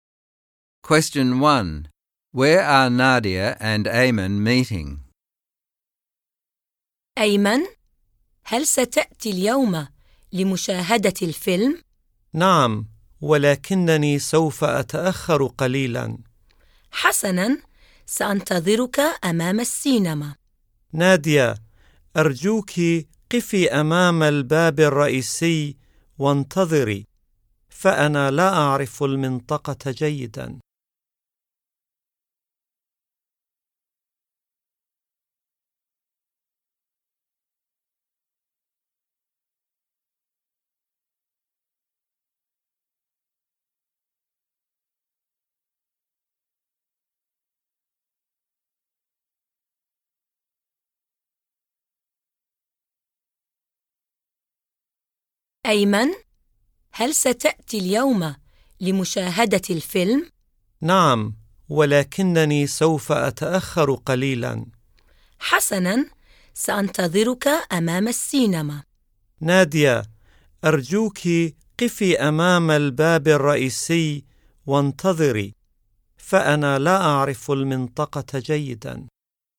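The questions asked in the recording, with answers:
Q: Where are Nadia and Ayman meeting?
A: In front of the cinema, at the main entrance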